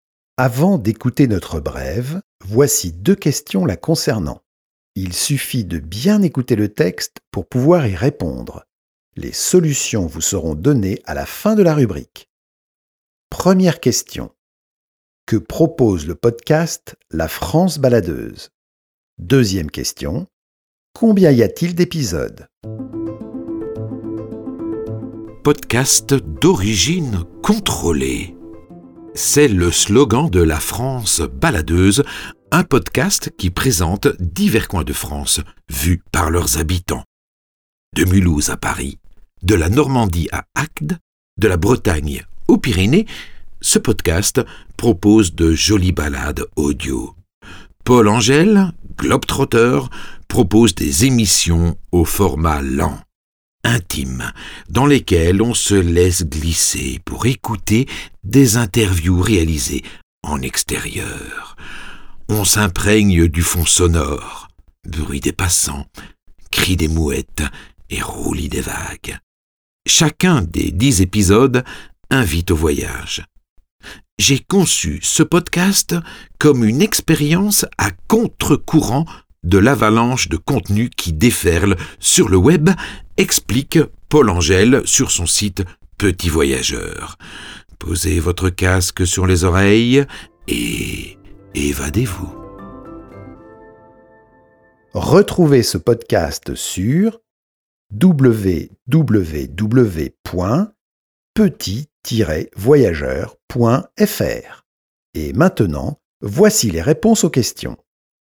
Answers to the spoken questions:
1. Le podcast La France baladeuse propose de découvrir des coins de France à travers le regard de leurs habitants.
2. Il y a 10 épisodes dans la série La France baladeuse.